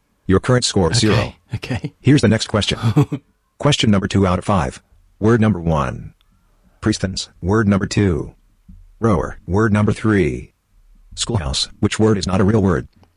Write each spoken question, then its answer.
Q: Which word is not a real word?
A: Priestens is not a real word.